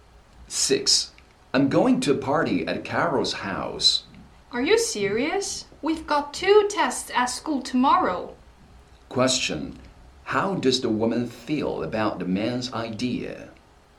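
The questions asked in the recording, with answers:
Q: Question. How does the woman feel about the man's idea?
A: She disapproves of it because they have two tests tomorrow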